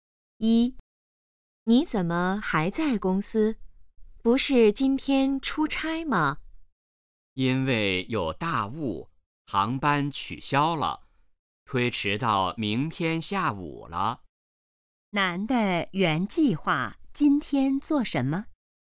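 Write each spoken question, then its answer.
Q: 男的原计划今天做什么?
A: 出差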